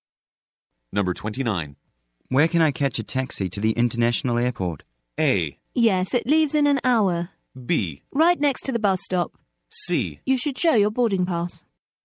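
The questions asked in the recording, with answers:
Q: Where can I catch a taxi to the international airport?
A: B: Right next to the bus stop.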